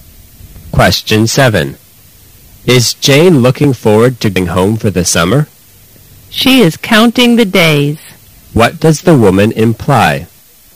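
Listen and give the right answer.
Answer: Jane is eager to be home for the summer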